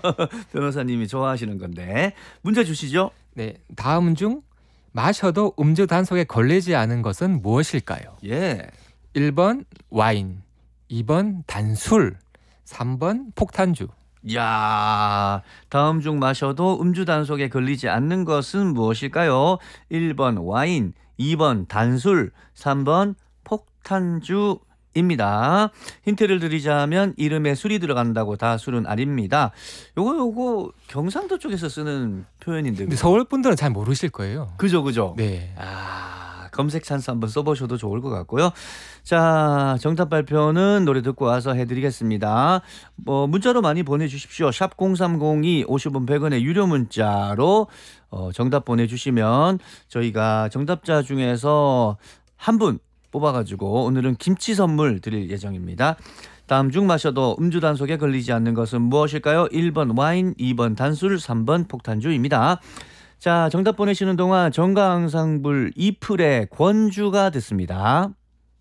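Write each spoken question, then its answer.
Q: 다음 중 마셔도 음주 단속에 걸리지 않는 것은 무엇일까요?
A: 2번: 단술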